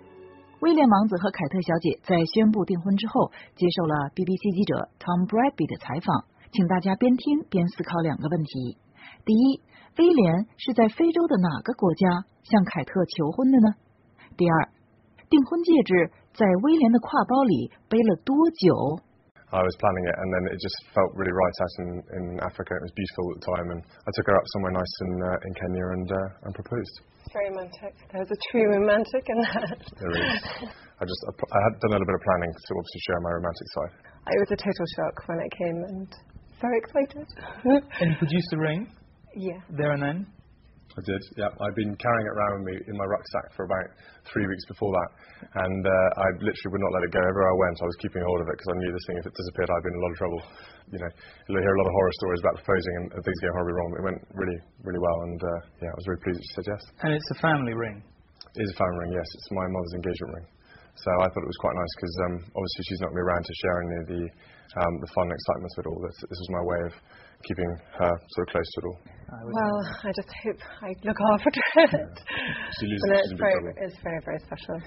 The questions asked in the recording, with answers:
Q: 第一威廉是在非洲的哪个国家向凯特求婚的呢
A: 第一,威廉在非洲的哪个国家向凯特求婚的? It was Kenya.

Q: 第二,订婚戒指在威廉的挎包里背了多久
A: 第二,订婚戒指在威廉的挎包里背了多久呢? The answer, about 3 weeks.